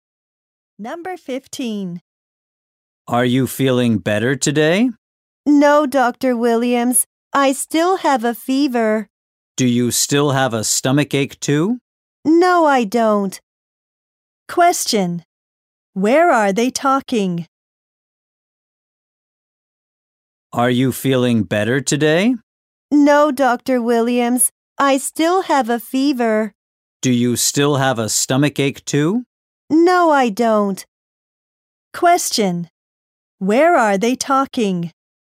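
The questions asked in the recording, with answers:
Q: Where are they talking?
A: At a doctor's office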